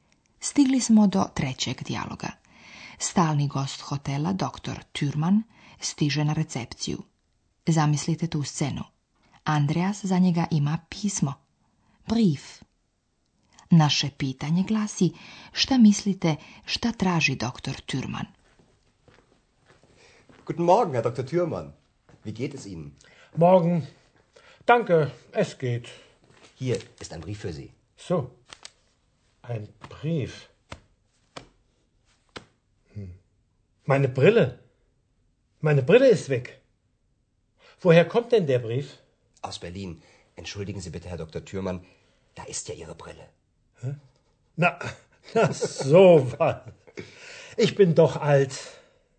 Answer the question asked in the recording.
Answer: Ali zato su mu potrebne naočare.